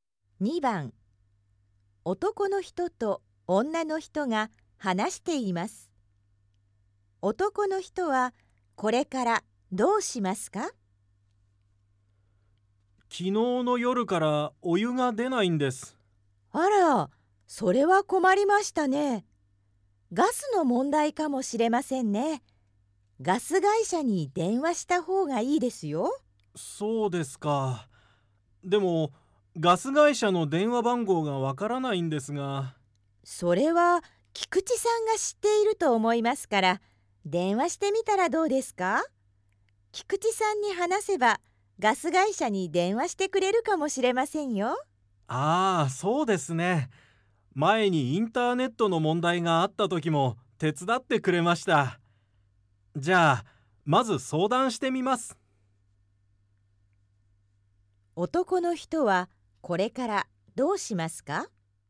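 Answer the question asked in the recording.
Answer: 菊池さんに電話して相談する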